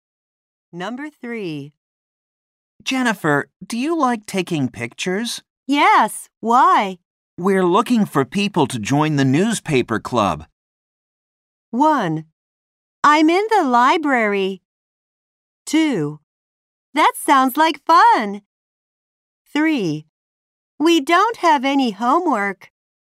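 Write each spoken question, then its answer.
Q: We're looking for people to join the newspaper club.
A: 2: That sounds like fun.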